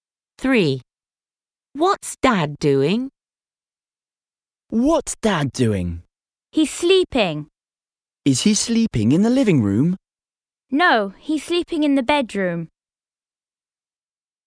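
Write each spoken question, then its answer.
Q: What's Dad doing?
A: Sleeping (in the bedroom)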